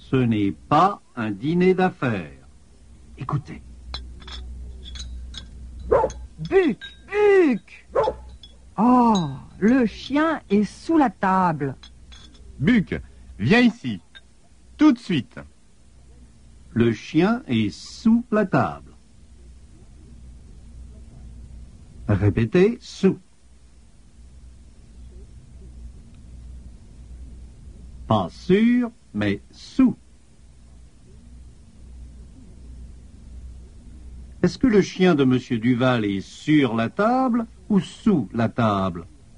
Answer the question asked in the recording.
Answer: Il est sous la table.